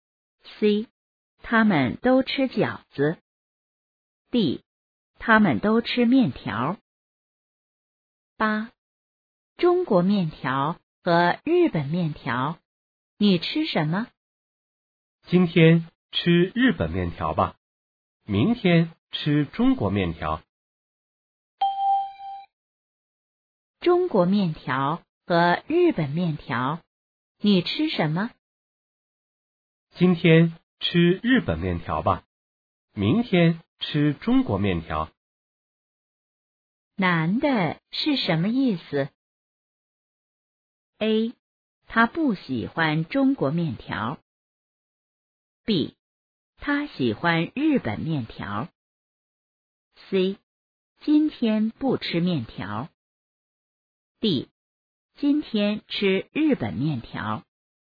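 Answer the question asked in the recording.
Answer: D: 今天吃日本面条。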